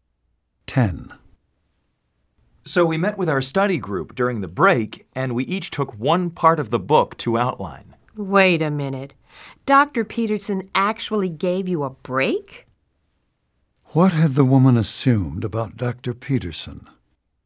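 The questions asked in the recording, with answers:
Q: What had the woman assumed about Dr. Peterson?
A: That he would not give a break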